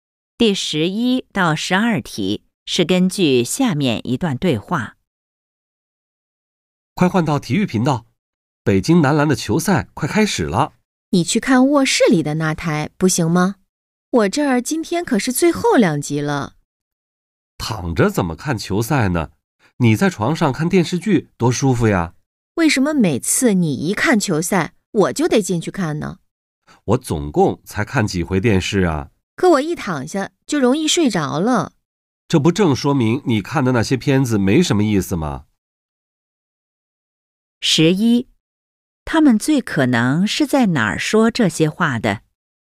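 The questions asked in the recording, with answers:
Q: 他们最可能是在哪儿说这些话的?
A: 在家里(客厅)看电视的地方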